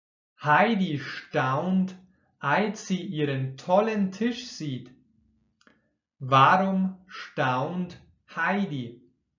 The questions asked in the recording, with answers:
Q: Warum staunt Heidi?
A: Weil sie den tollen Tisch sieht.